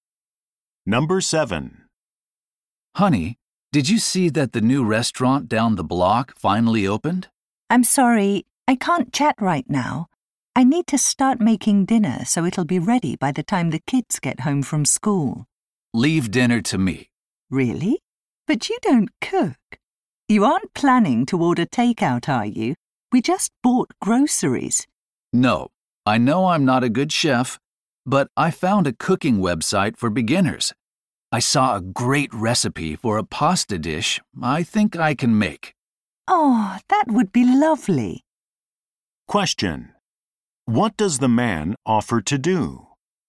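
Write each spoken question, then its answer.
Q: What does the man offer to do?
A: Make dinner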